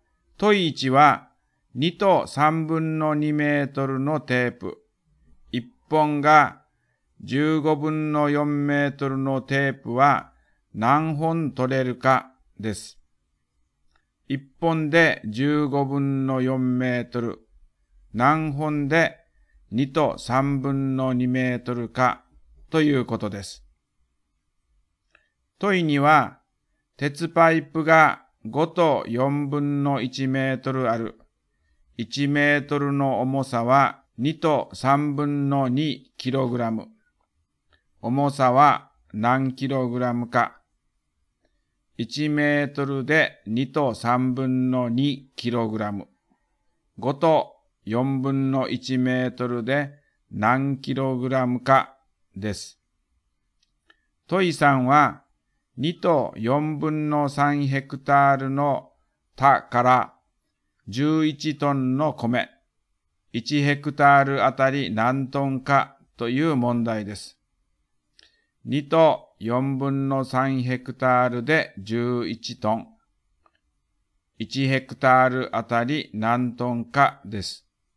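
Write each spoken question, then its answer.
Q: 問1は、2と3分の2メートルのテープ。1本が15分の4メートルのテープは何本取れるかです。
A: 10本

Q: 問2は、鉄パイプが5と4分の1メートルある。 1メートルの重さは2と3分の2キログラム。重さは何キログラムか。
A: 14キログラム

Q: 問3は、2と4分の3ヘクタールの田から11トンの米、1ヘクタールあたり何トンかという問題です。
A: 4トン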